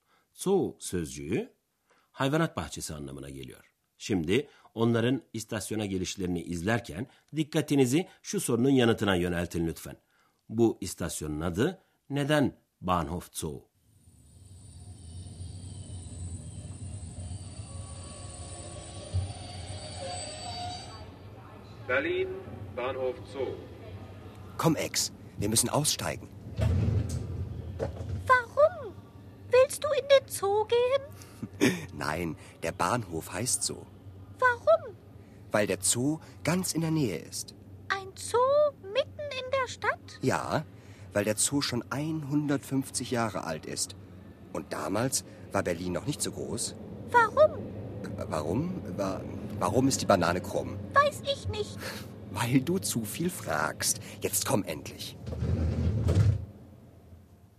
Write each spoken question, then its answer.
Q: Bu istasyonun adı neden Bahnhof Zoo?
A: Berlin'deki bu istasyon bir hayvanat bahçesinin yakınında olduğu için Bahnhof Zoo yani hayvanat bahçesi istasyonu olarak adlandırılmış.